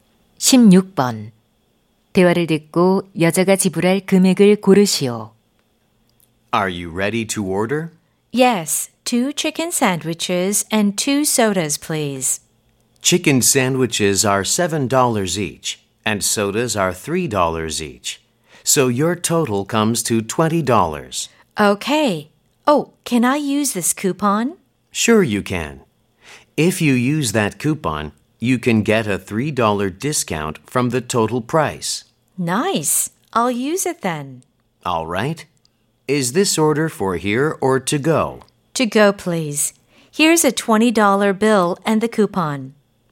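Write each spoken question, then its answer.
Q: 대화를 듣고 여자가 지불할 금액을 고르시오.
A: 17달러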